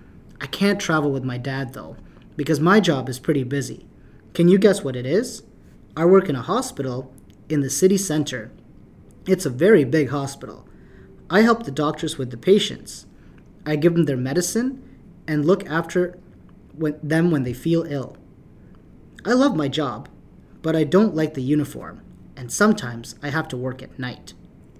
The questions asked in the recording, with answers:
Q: Can you guess what it is?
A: Wow, are you a nurse?